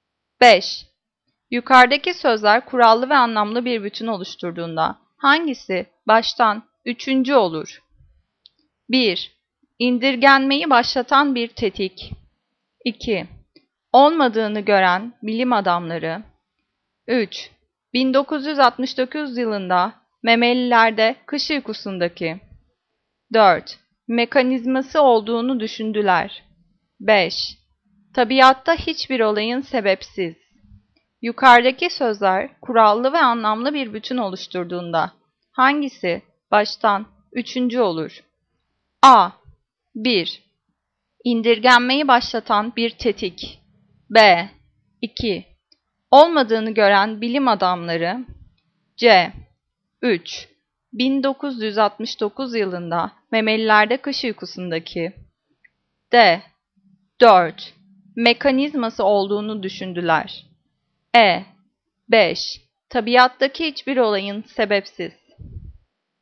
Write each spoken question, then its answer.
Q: Yukarıdaki sözler kurallı ve anlamlı bir bütün oluşturduğunda hangisi baştan üçüncü olur?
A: Cevap C. 3. 1969 yılında memelilerde kış uykusundaki.